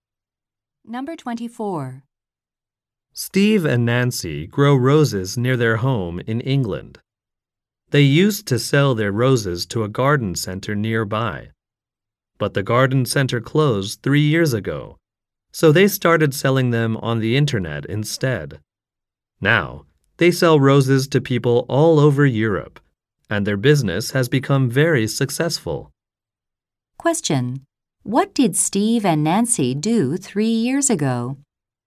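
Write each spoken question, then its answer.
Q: What did Steve and Nancy do 3 years ago?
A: Started selling roses on the internet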